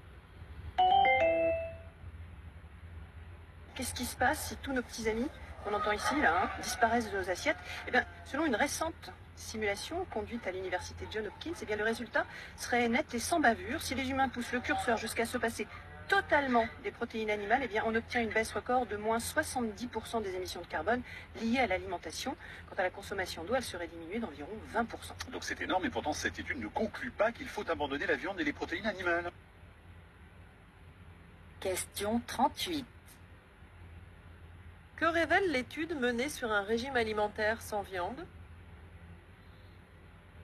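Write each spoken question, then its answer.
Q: Que révèle l'étude menée sur un régime alimentaire sans viande ?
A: Qu'il ferait baisser de 70 % les émissions de carbone liées à l'alimentation et d'environ 20 % la consommation d'eau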